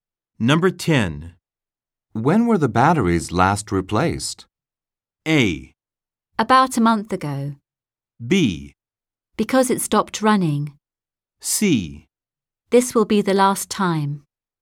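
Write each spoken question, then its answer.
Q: When were the batteries last replaced?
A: A: About a month ago.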